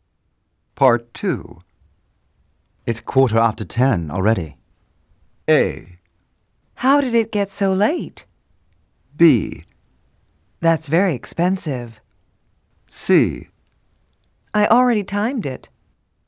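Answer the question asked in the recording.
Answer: A: How did it get so late?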